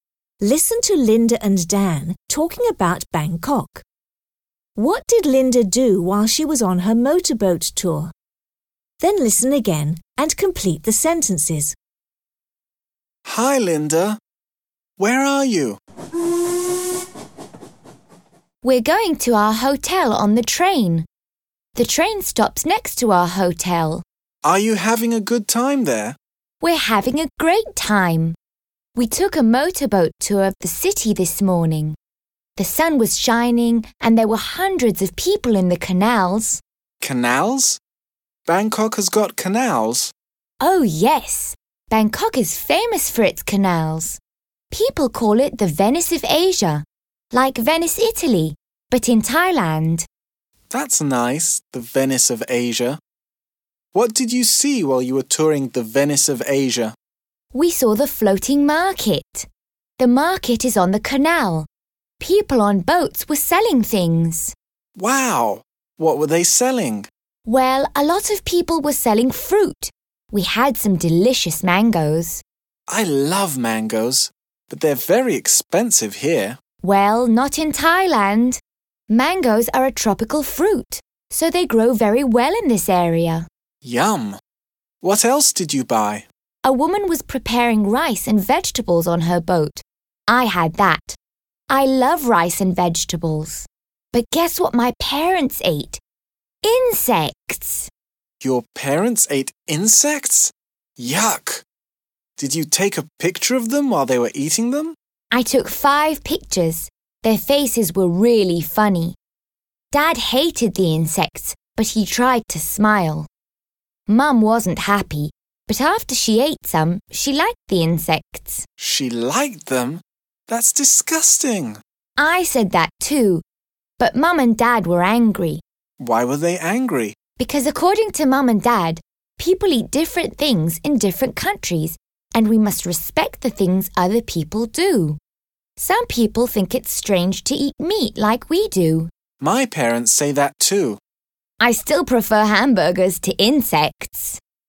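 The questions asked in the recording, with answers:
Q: What did Linda do while she was on her motorboat tour?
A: She saw the floating market and ate mangoes and rice and vegetables.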